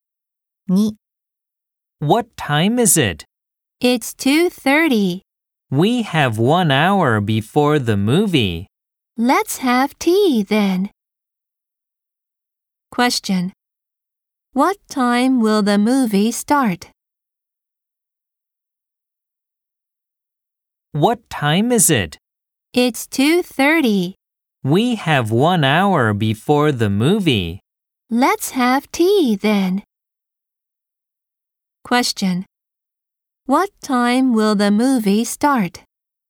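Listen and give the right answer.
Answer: At 3:30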